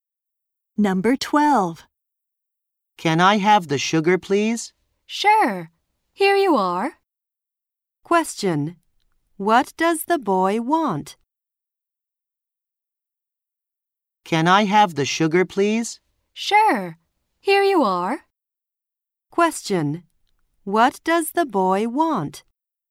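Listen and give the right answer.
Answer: The sugar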